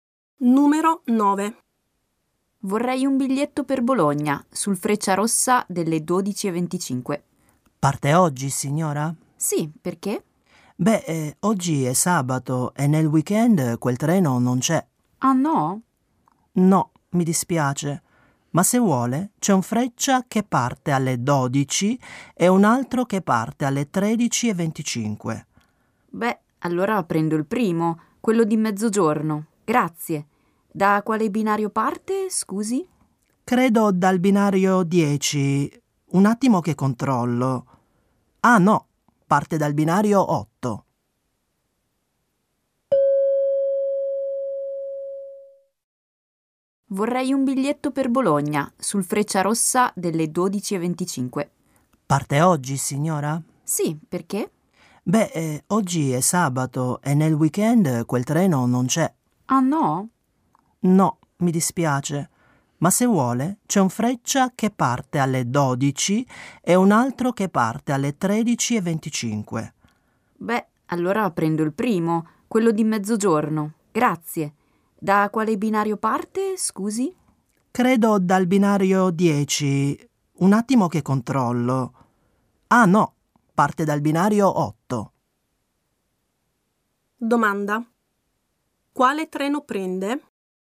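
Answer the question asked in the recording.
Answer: Il Freccia delle 12 (mezzogiorno), dal binario 8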